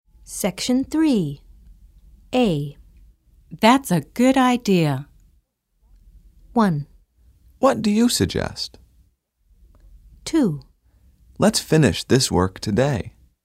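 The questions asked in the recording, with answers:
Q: That's a good idea.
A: 2: Let's finish this work today.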